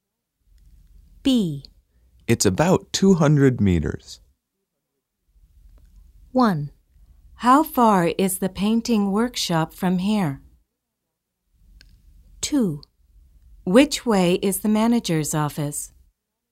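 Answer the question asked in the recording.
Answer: 1: How far is the painting workshop from here?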